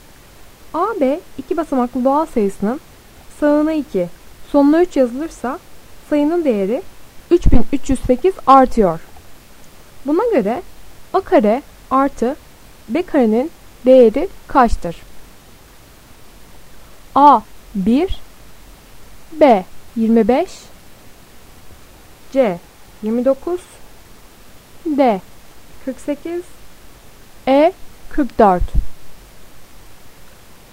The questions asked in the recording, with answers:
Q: Buna göre A kare artı B karenin değeri kaçtır?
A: Doğru cevap B 25.